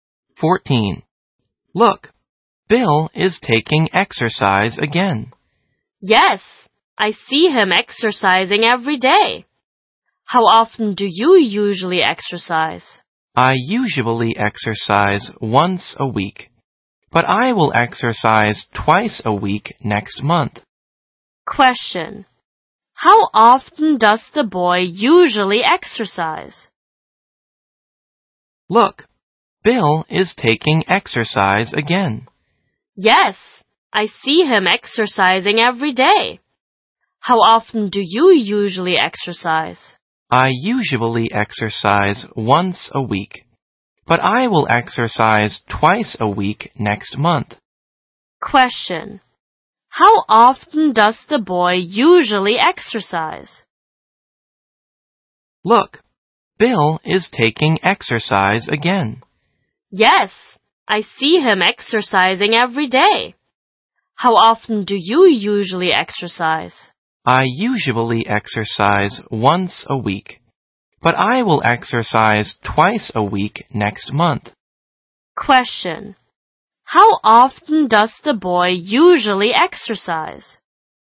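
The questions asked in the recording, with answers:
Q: How often does the boy usually exercise?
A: Once a week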